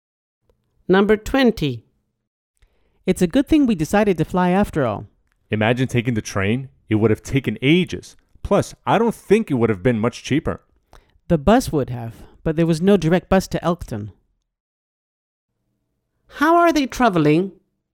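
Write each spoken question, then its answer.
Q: How are they traveling?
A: By plane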